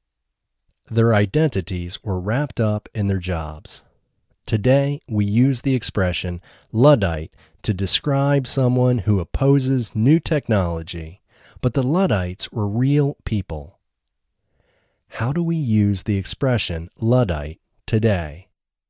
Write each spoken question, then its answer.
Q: How do we use the expression Luddite today?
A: Today, we use the expression Luddite to describe someone who opposes new technology.